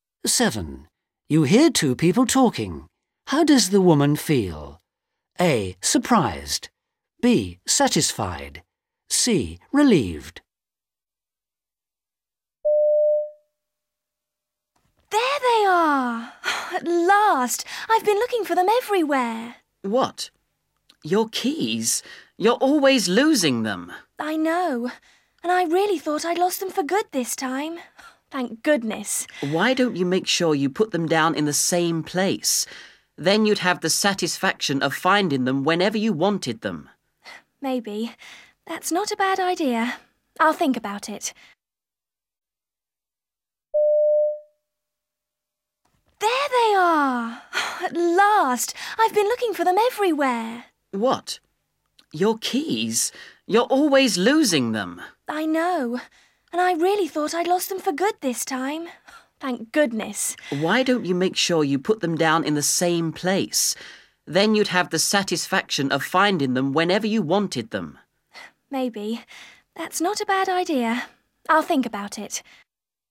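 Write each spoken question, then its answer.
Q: How does the woman feel?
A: C: Relieved.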